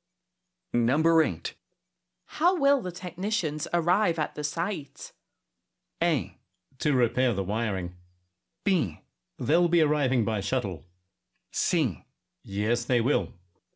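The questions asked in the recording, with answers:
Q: How will the technicians arrive at the site?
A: B: They'll be arriving by shuttle.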